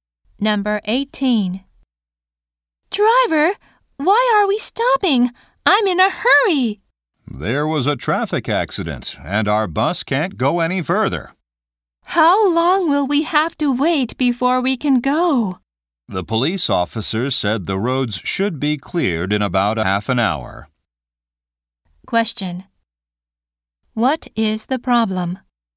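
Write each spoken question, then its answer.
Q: What is the problem?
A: A traffic accident is blocking the bus.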